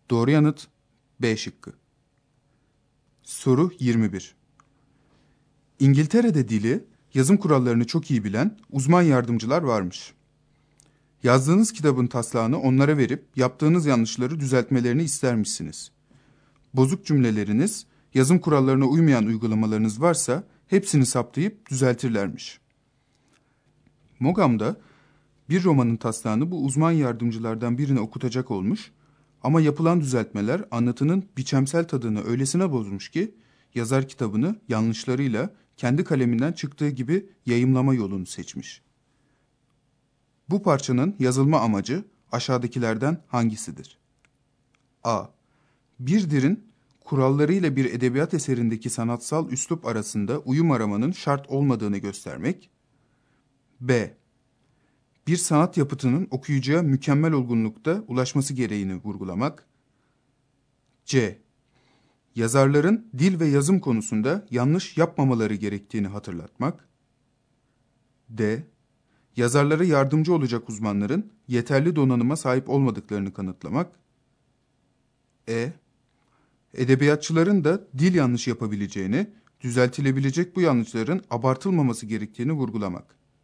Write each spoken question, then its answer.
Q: Bu parçanın yazılma amacı aşağıdakilerden hangisidir?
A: Doğru yanıt A şıkkı.